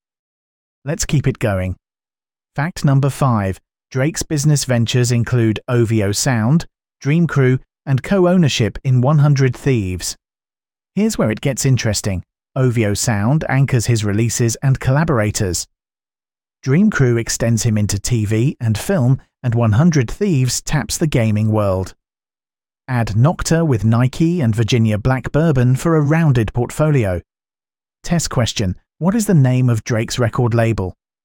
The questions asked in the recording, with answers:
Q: What is the name of Drake's record label?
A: Correct answer, OVO Sound.